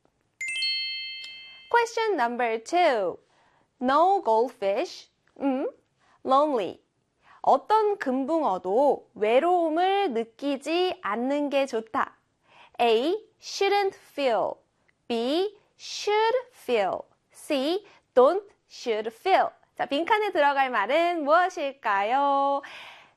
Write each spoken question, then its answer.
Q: Question number two. No goldfish. Lonely. 어떤 금붕어도 외로움을 느끼지 않는 게 좋다. A. shouldn't feel. B. should feel. C. don't should feel. 자, 빈칸에 들어갈 말은 무엇일까요?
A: 네, 그렇죠. B의 should feel이요.